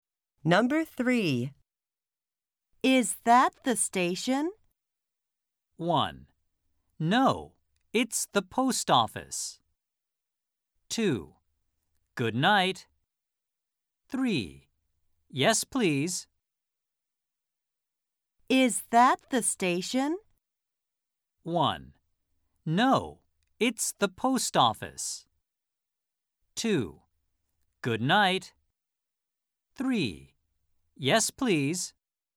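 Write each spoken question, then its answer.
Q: Is that the station?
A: 1: No, it's the post office.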